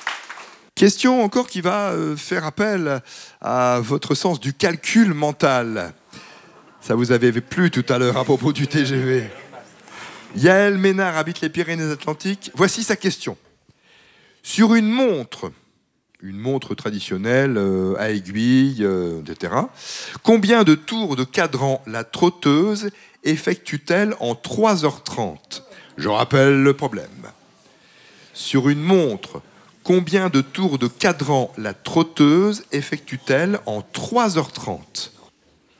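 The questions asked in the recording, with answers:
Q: Sur une montre traditionnelle à aiguille, etc., combien de tours de cadran la trotteuse effectue-t-elle en 3h30?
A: 210 tours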